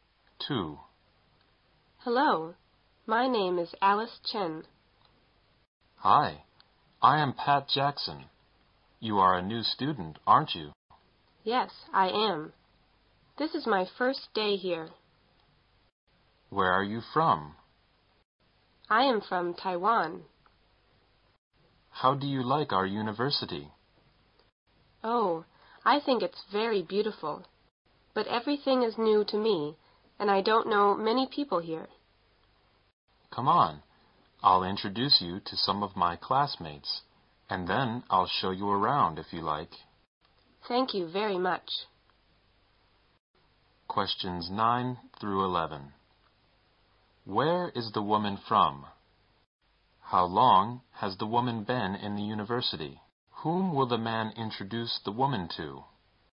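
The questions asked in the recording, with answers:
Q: Where is the woman from?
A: Taiwan

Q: How long has the woman been in the university?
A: One day; it's her first day

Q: Whom will the man introduce the woman to?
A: Some of his classmates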